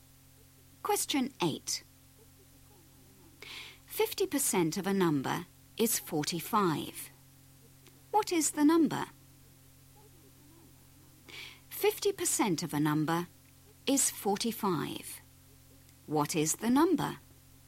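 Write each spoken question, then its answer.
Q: 50% of a number is 45. What is the number?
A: 90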